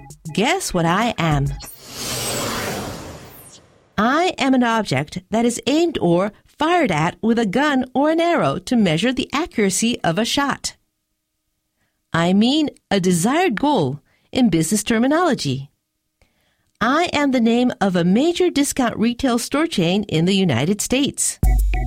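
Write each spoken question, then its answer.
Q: Guess what I am?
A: A target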